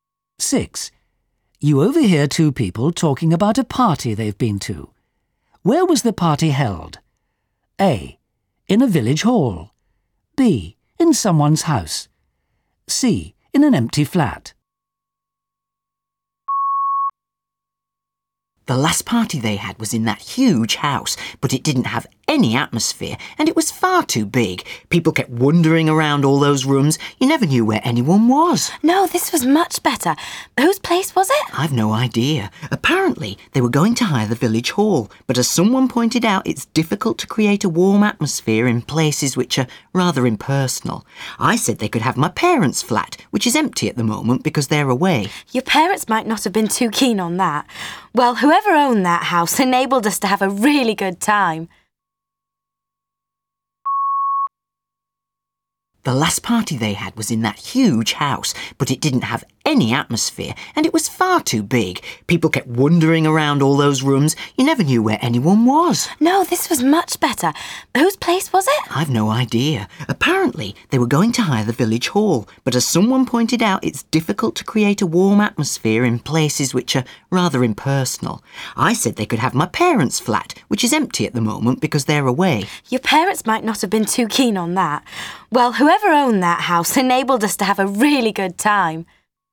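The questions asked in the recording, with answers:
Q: Where was the party held?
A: B: In someone's house.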